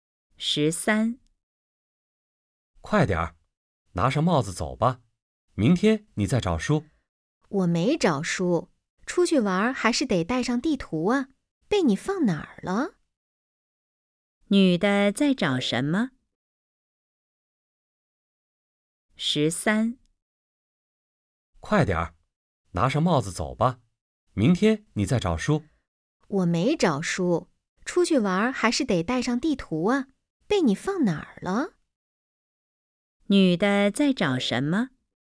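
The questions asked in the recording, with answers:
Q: 女的在找什么?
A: 地图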